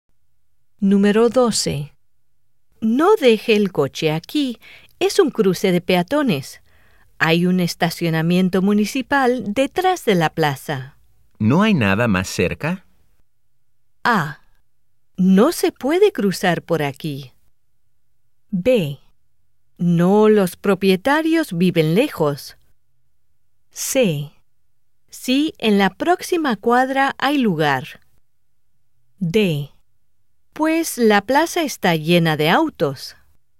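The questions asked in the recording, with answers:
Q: ¿No hay nada más cerca?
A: C: Sí, en la próxima cuadra hay lugar.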